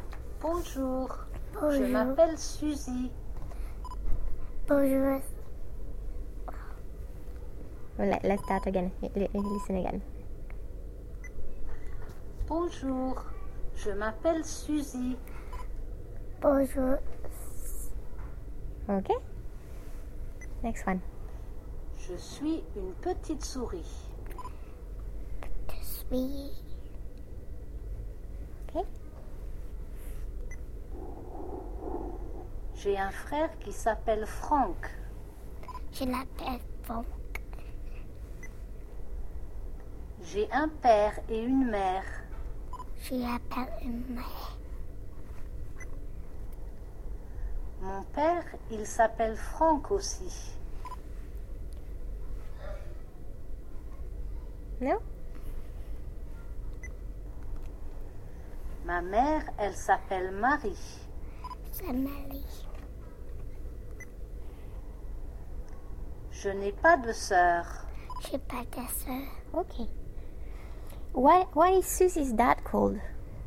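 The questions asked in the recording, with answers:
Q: Why is Susie's dad called?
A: Franck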